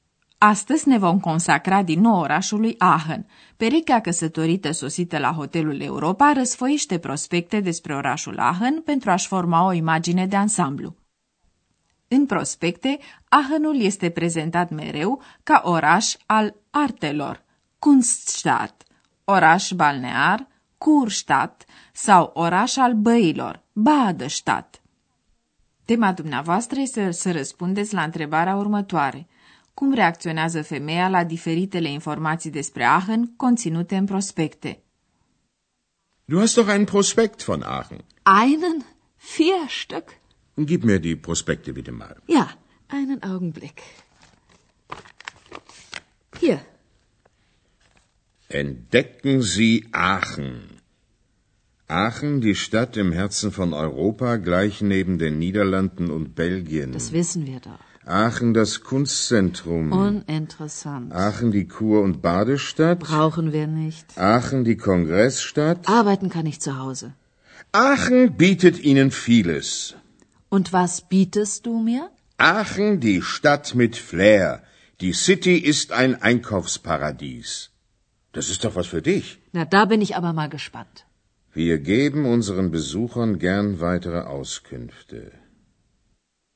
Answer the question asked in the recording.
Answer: Prospectul, așa cum trebuie să facă un prospect, scoate în evidență multitudinea de aspecte ale orașului Aachen, dar femeia nu manifestă prea mult interes.